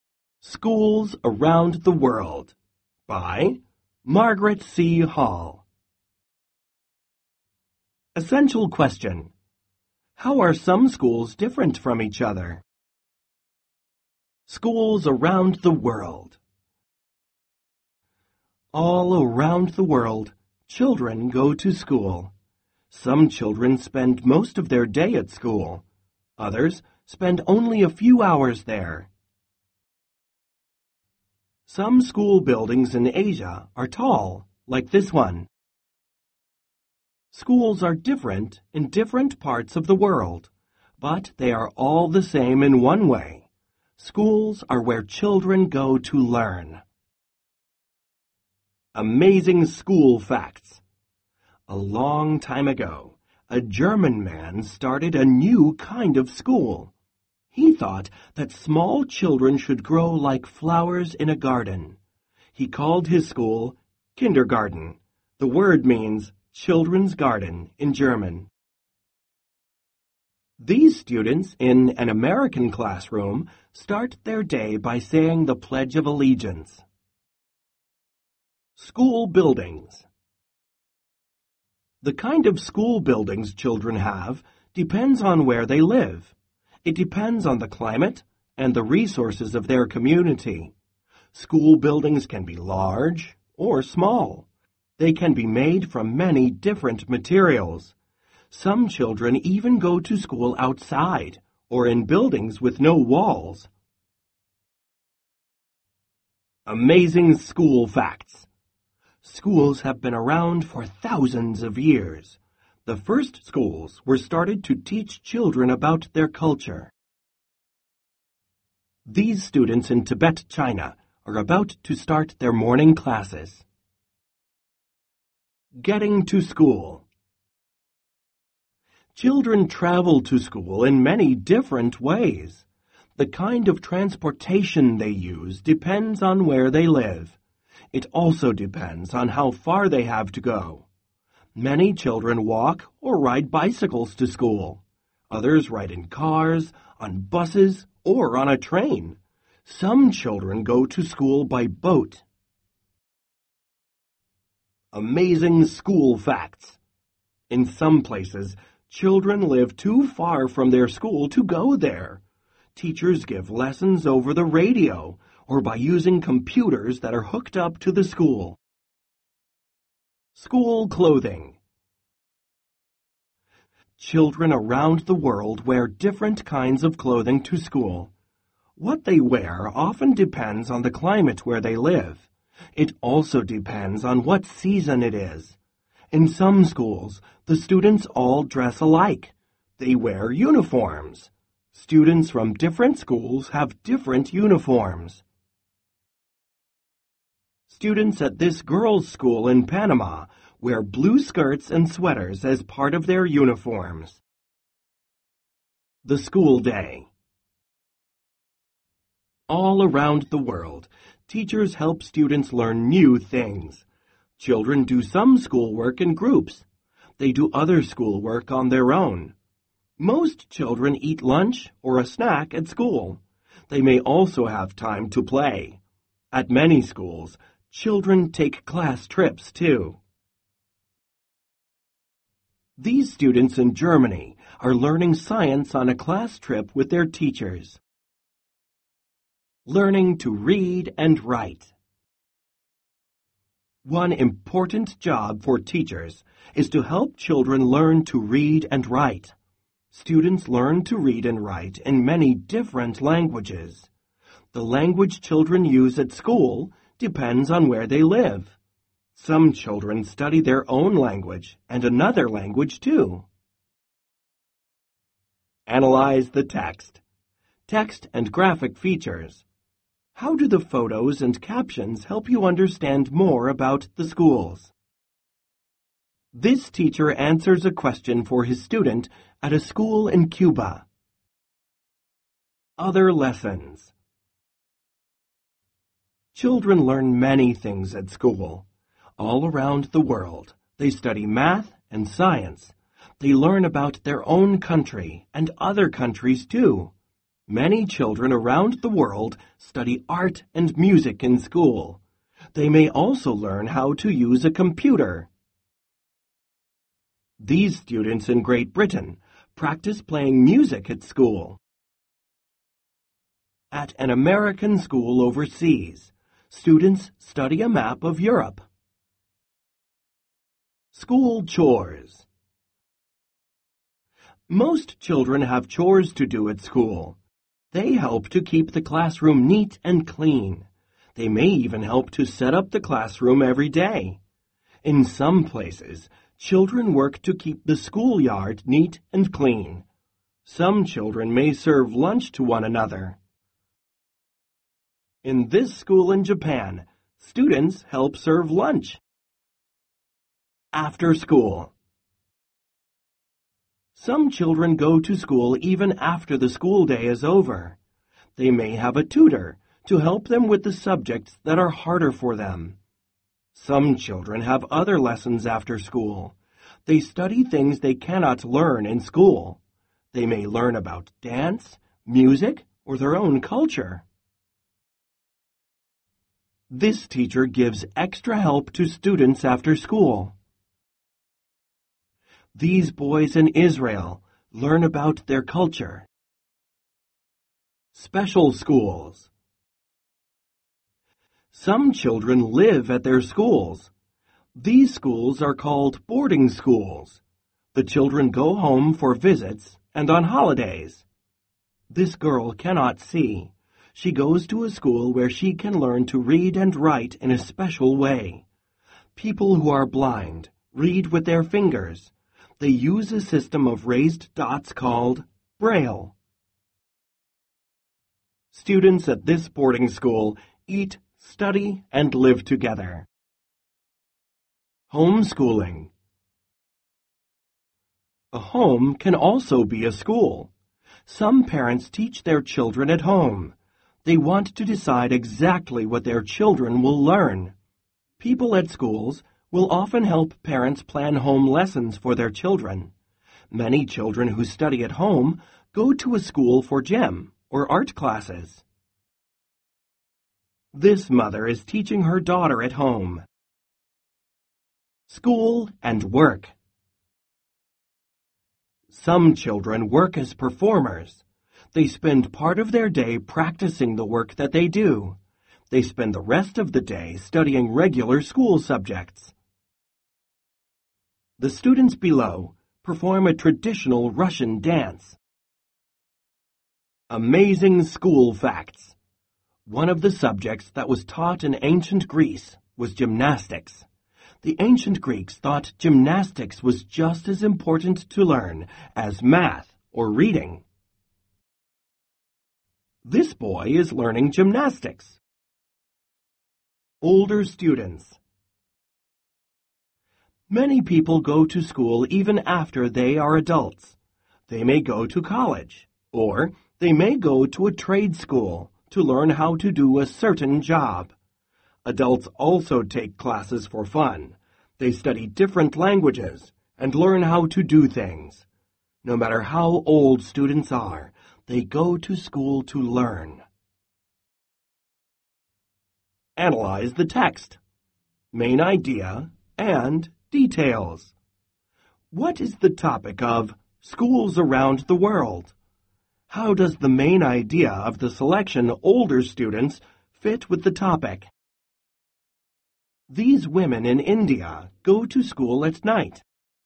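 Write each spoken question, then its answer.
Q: What is the topic of Schools Around the World?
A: Schools in different parts of the world: how they are different, though in all of them children go to learn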